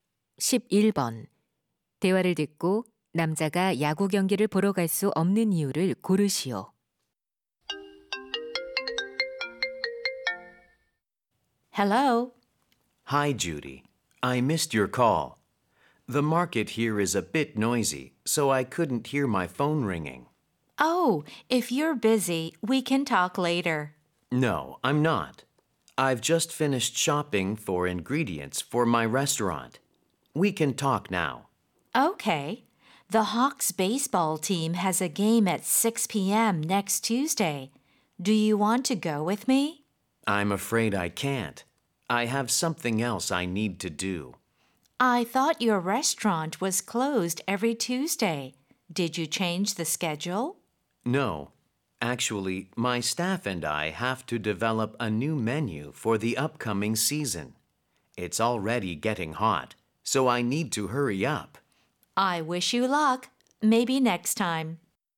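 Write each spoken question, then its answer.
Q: 대화를 듣고 남자가 야구 경기를 보러 갈 수 없는 이유를 고르시오.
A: 새 메뉴를 개발해야 해서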